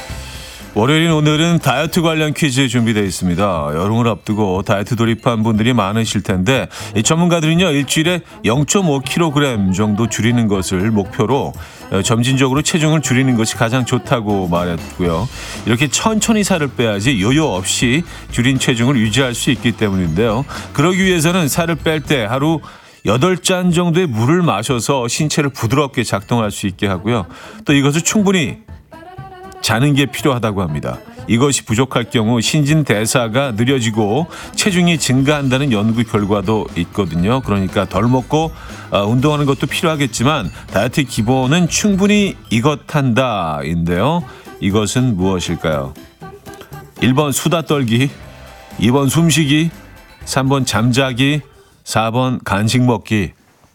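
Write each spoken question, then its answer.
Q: 이것은 무엇일까요? 1번 수다 떨기, 2번 숨쉬기, 3번 잠자기, 4번 간식 먹기.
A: 3번: 잠자기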